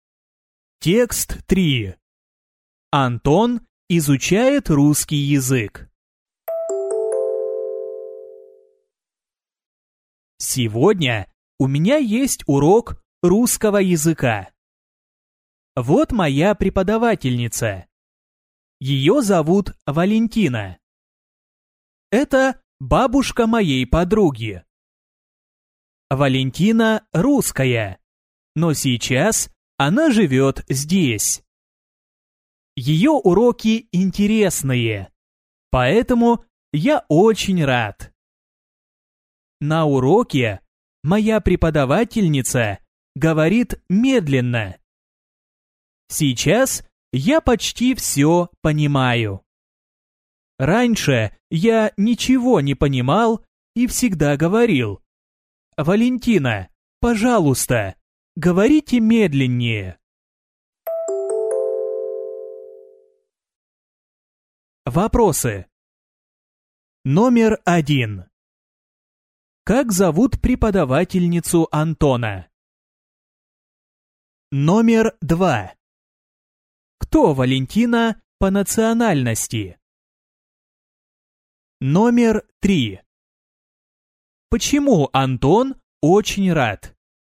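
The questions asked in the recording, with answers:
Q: Как зовут преподавательницу Антона?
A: Валентина

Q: Кто Валентина по национальности?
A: Русская

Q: Почему Антон очень рад?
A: Потому что уроки Валентины интересные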